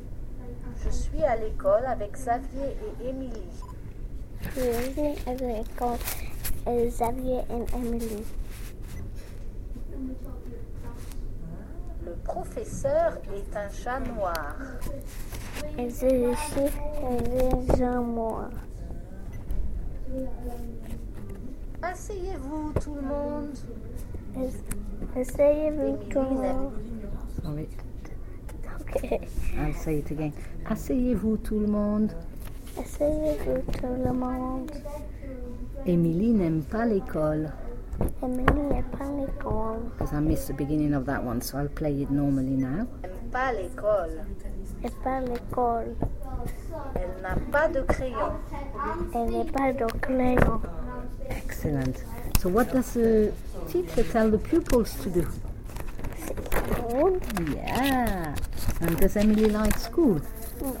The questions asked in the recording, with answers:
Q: And does Emily like school?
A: No. Excellent.